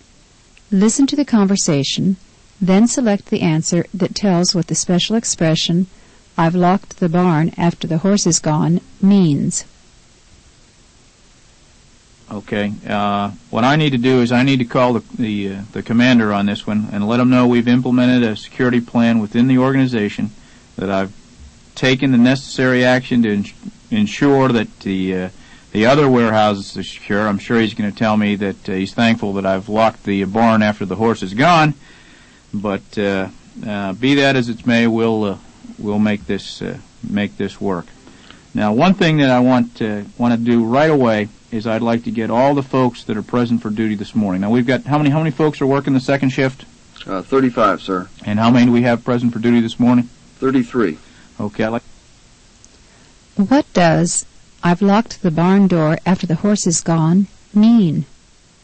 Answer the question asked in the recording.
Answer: I took preventive action too late.